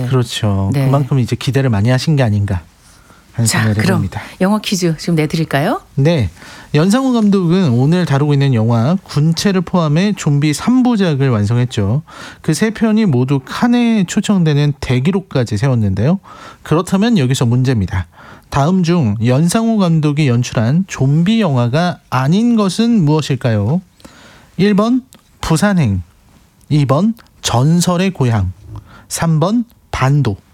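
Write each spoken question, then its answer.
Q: 다음 중 연상우 감독이 연출한 좀비 영화가 아닌 것은 무엇일까요?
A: 2: 전설의 고향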